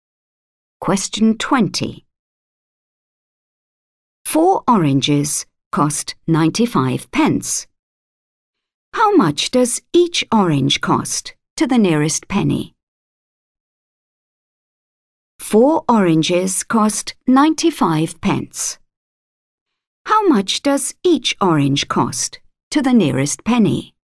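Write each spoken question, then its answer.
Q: 4 oranges cost 95 pence. How much does each orange cost to the nearest penny?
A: 24p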